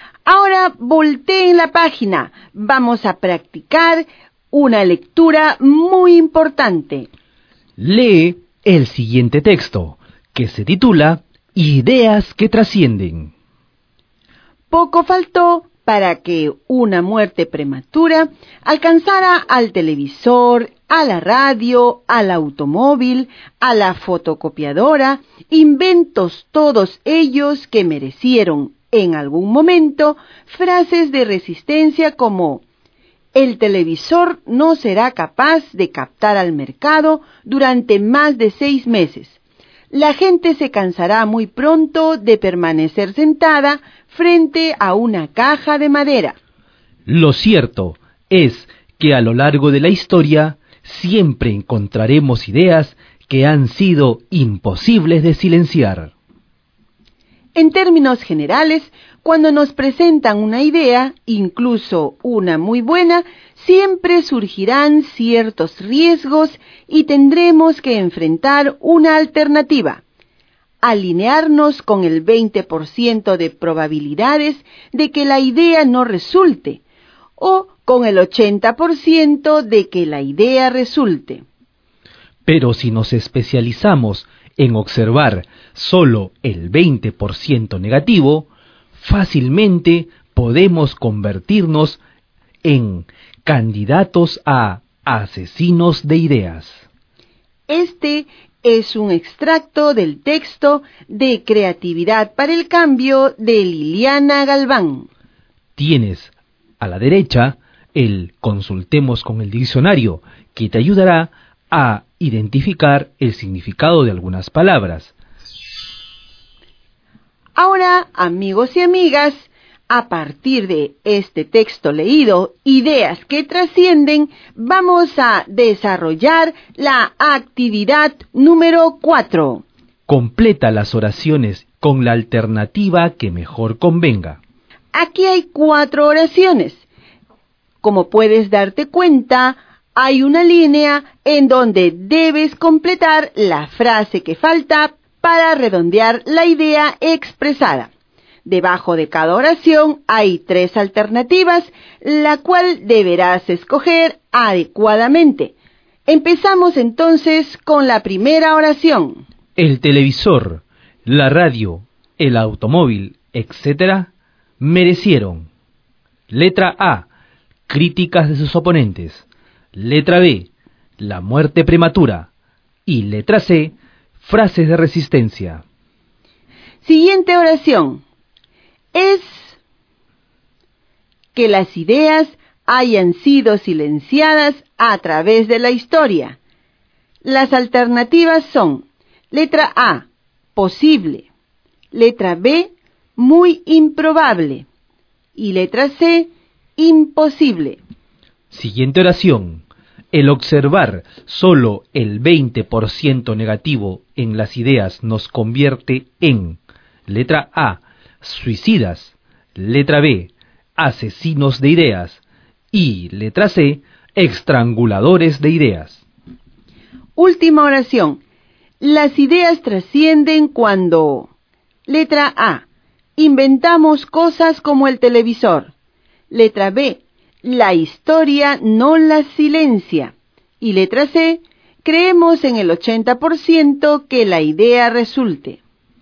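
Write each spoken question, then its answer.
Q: El televisor, la radio, el automóvil, etcétera, merecieron.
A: C: frases de resistencia

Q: Es que las ideas hayan sido silenciadas a través de la historia.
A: C: imposible

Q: El observar solo el 20% negativo en las ideas nos convierte en:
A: B: asesinos de ideas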